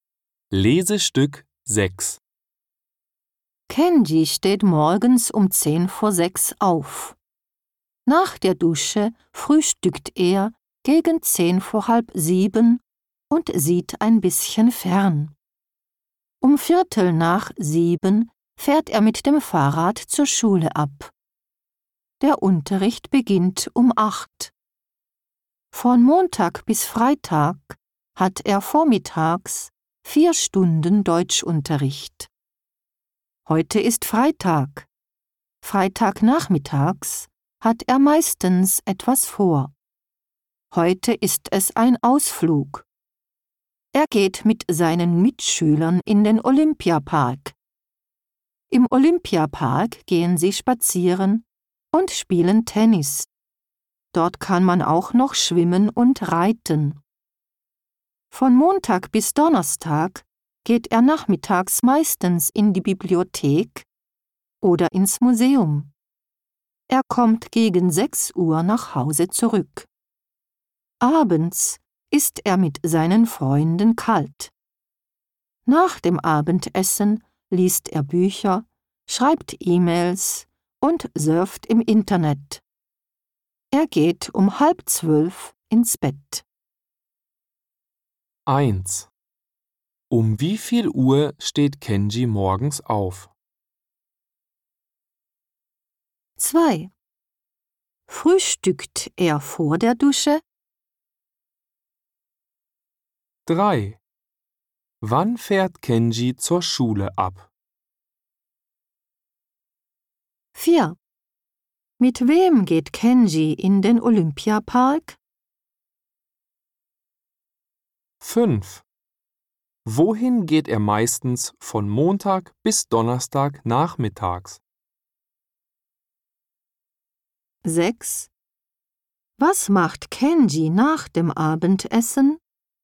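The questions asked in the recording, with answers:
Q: Um wie viel Uhr steht Kenji morgens auf?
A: Um 5:50

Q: Frühstückt er vor der Dusche?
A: Nein, er frühstückt nach der Dusche.

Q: Wann fährt Kenji zur Schule ab?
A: Um 6:45

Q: Mit wem geht Kenji in den Olympiapark?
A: Mit seinen Mitschülern

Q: Wohin geht er meistens von Montag bis Donnerstag nachmittags?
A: In die Bibliothek oder ins Museum

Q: Was macht Kenji nach dem Abendessen?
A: Er liest Bücher, schreibt E-Mails und surft im Internet.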